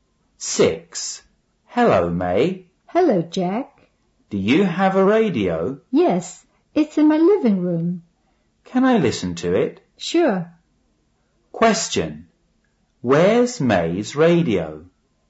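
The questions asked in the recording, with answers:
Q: Question. Where's May's radio?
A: In her living room.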